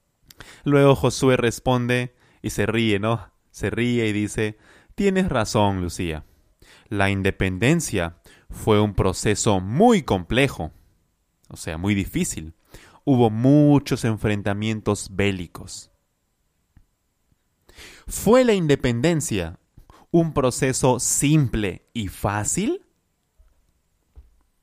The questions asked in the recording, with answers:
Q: ¿Fue la independencia un proceso simple y fácil?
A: No, claro que no, claro que no.